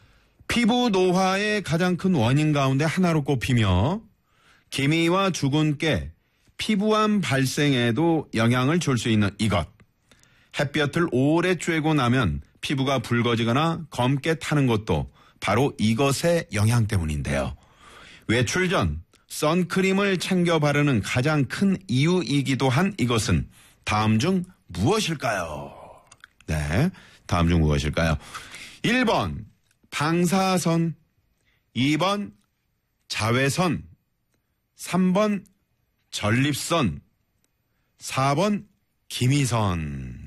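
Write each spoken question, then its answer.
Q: 외출 전 선크림을 챙겨 바르는 가장 큰 이유이기도 한 이것은 다음 중 무엇일까요?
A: 2: 자외선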